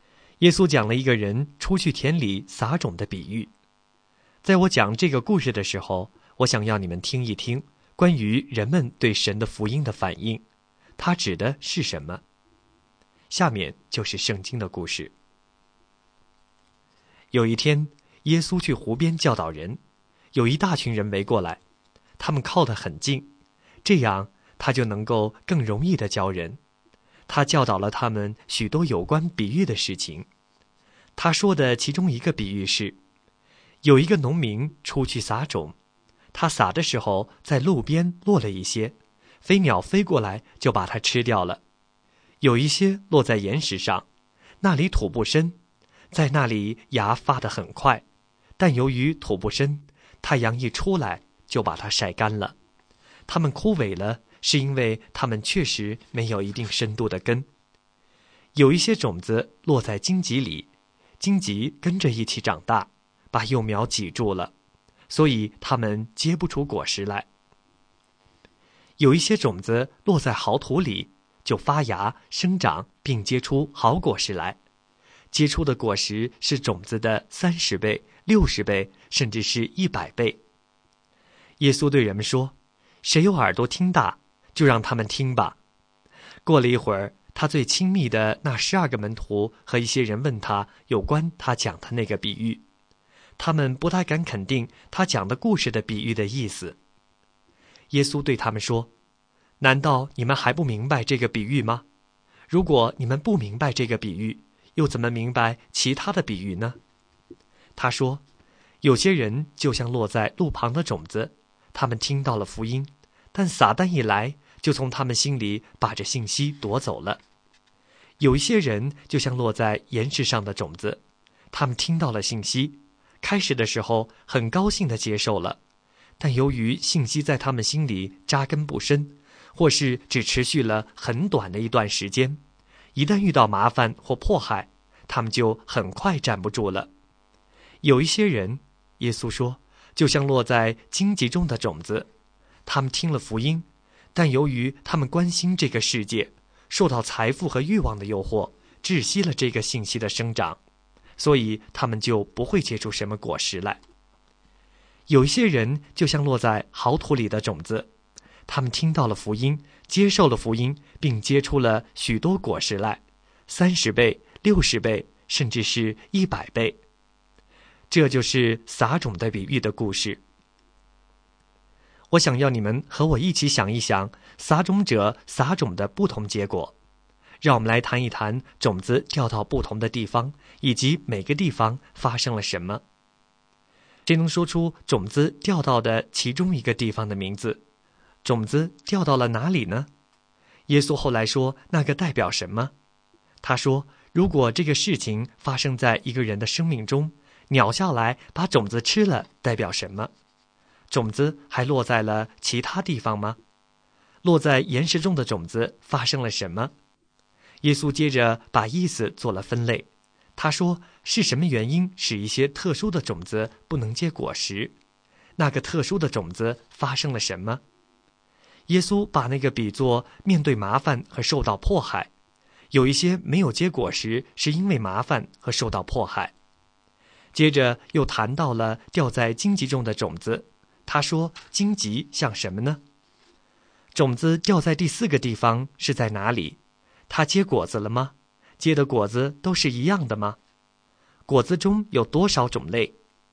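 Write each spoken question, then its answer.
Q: 他说,如果这个事情发生在一个人的生命中,鸟下来把种子吃了代表什么?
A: 撒旦来从人心里把福音信息夺走

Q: 落在岩石中的种子发生了什么?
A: 发芽很快,但土不深、没有根,太阳一出来就晒干枯萎了

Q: 他说荆棘像什么呢?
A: 对世界的关心、财富和欲望的诱惑

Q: 种子掉在第四个地方是在哪里?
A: 好土里

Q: 果子中有多少种类?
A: 三种:30倍、60倍、100倍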